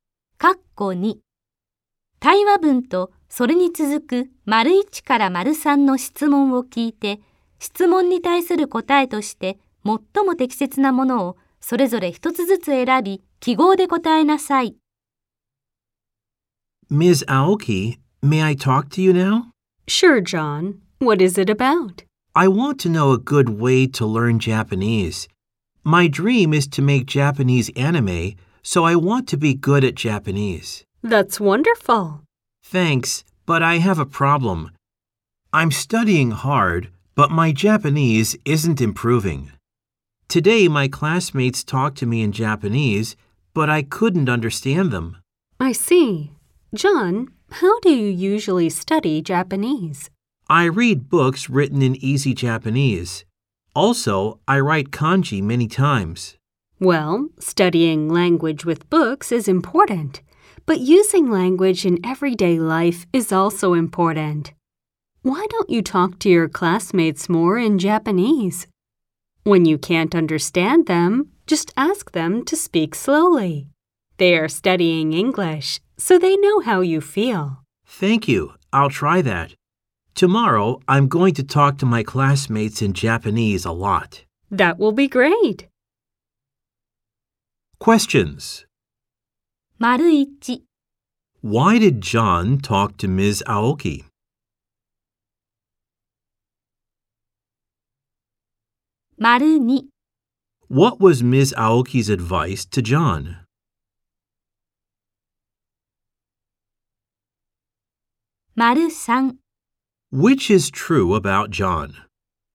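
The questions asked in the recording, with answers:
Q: Why did John talk to Ms. Aoki?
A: He wanted to know a good way to learn Japanese

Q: What was Ms. Aoki's advice to John?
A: To talk to his classmates more in Japanese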